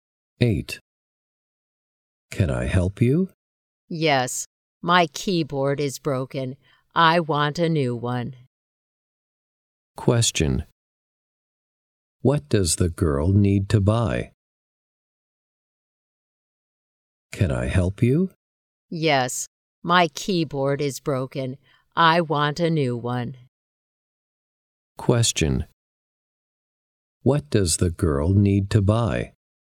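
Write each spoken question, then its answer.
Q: What does the girl need to buy?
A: A new keyboard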